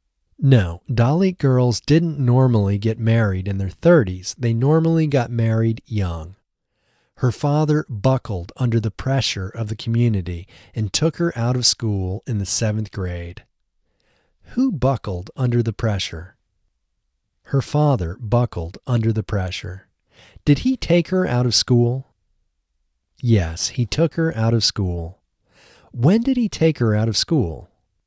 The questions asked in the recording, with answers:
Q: When did he take her out of school?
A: He took her out of school in the seventh grade.